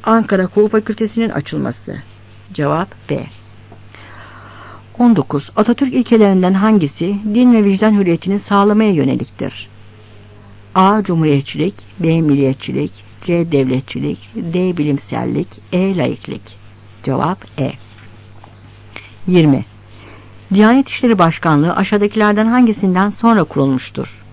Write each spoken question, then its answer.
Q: Atatürk ilkelerinden hangisi din ve vicdan hürriyetini sağlamaya yöneliktir?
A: Cevap E.